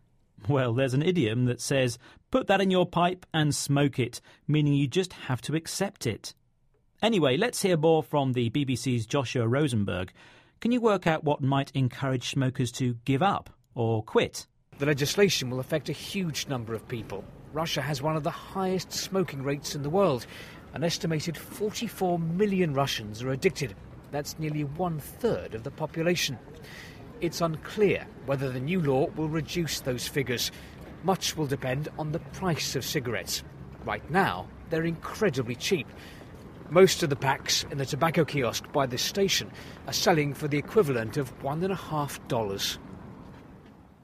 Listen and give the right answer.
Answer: So, to help people stop smoking, prices need to rise.